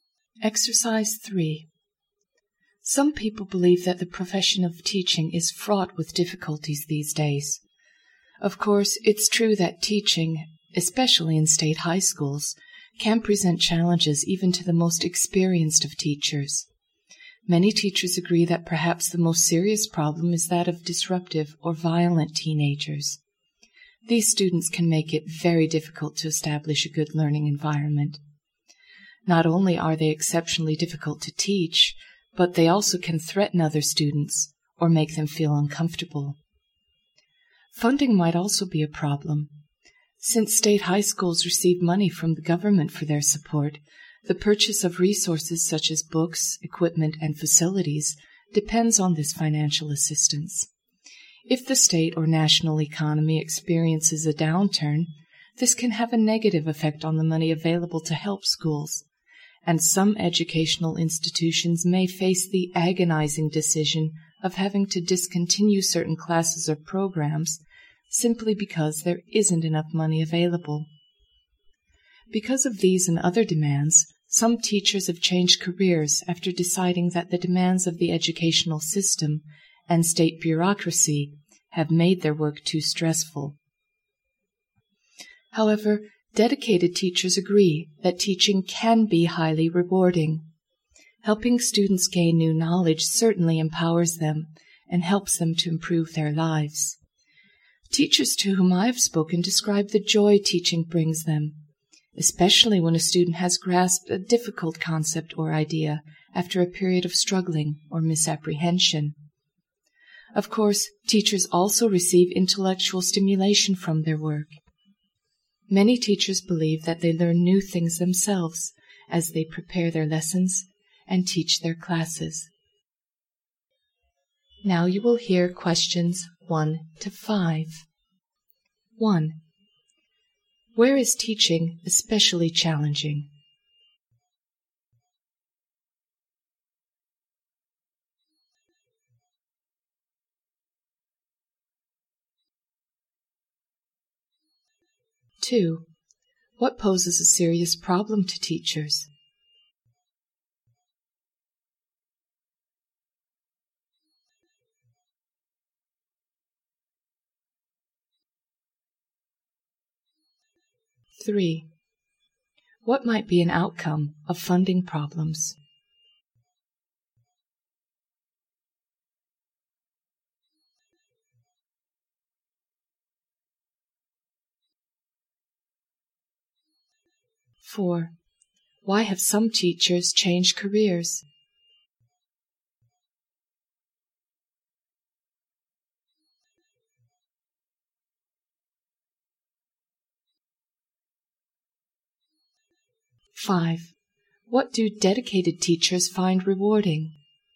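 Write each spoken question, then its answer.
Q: Where is teaching especially challenging?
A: In state high schools

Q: What poses a serious problem to teachers?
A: Disruptive or violent teenagers

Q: What might be an outcome of funding problems?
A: Schools may have to discontinue certain classes or programs

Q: Why have some teachers changed careers?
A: The demands of the educational system and state bureaucracy made their work too stressful

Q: What do dedicated teachers find rewarding?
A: Helping students gain new knowledge and seeing them grasp difficult ideas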